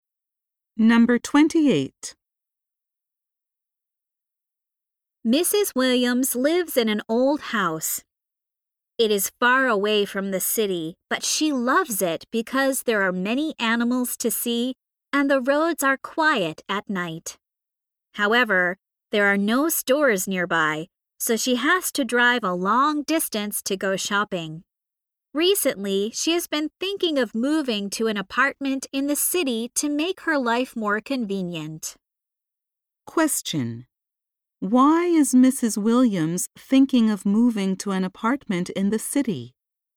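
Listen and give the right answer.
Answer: Her house is far from stores, so shopping is inconvenient.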